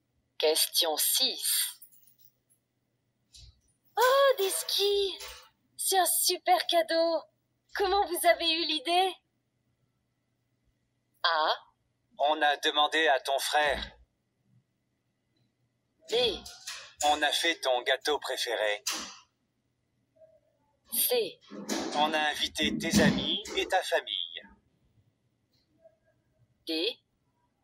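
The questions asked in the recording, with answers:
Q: Comment vous avez eu l'idée?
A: A: On a demandé à ton frère.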